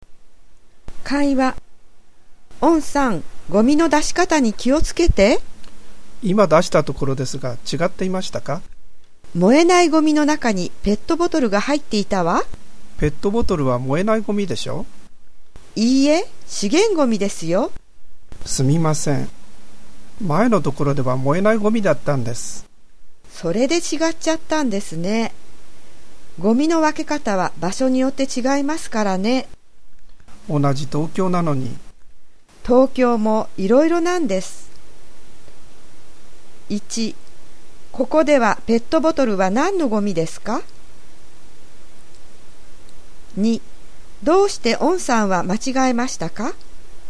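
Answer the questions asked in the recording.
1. 資源ゴミ
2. 前に住んでいたところではペットボトルは燃えないゴミだったから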